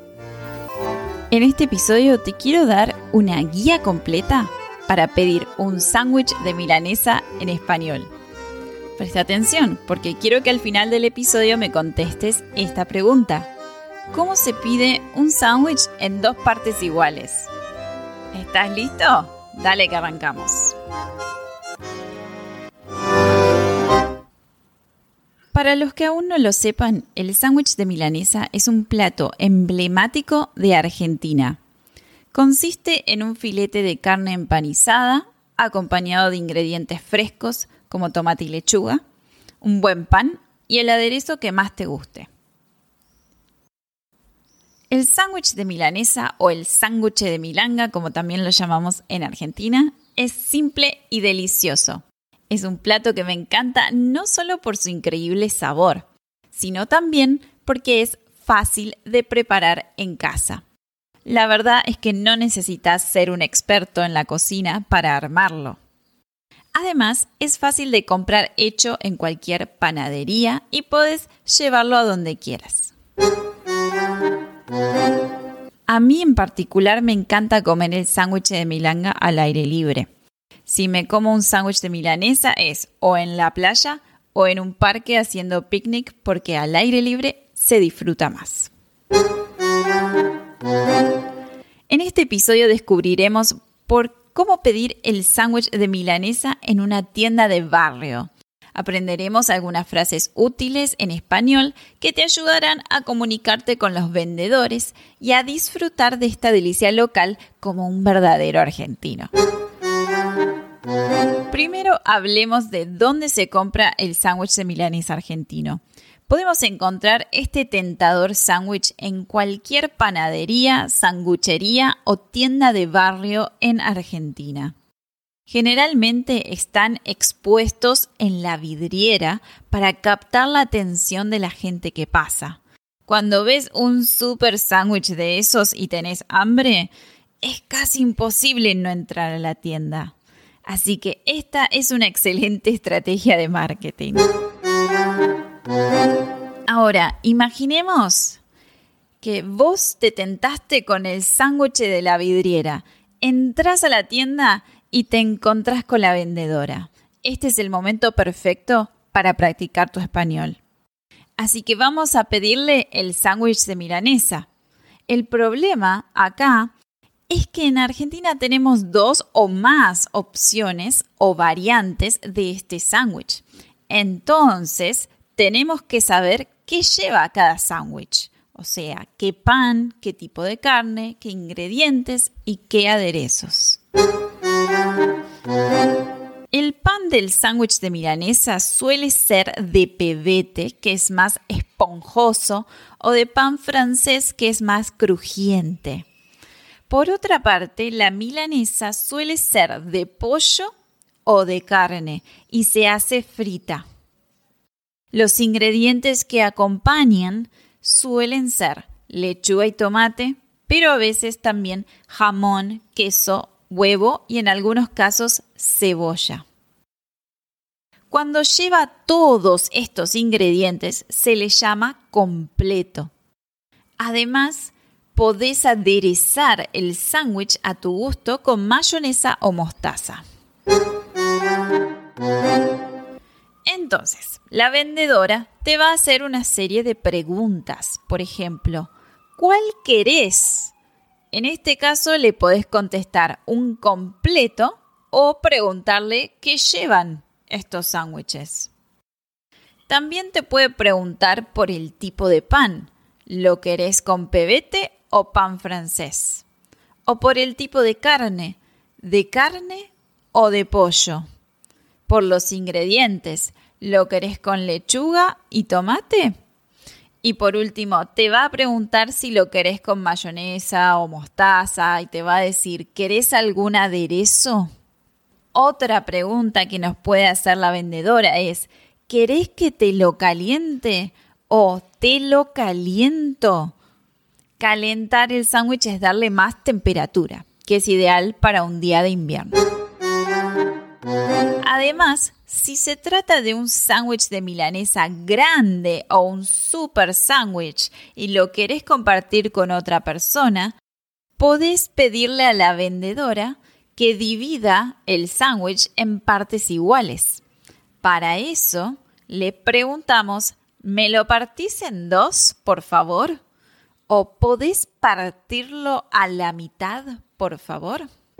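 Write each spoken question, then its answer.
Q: ¿Cómo se pide un sándwich en dos partes iguales?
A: ¿Me lo partís en dos, por favor? / ¿Podés partirlo a la mitad, por favor?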